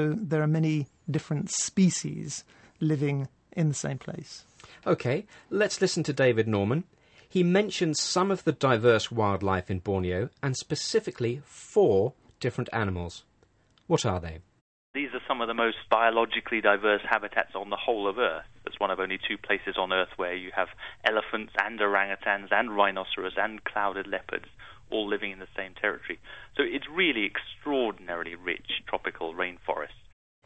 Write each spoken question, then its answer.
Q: What are they?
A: He mentioned elephants, orangutans, which are large apes, rhinoceros and clouded leopards.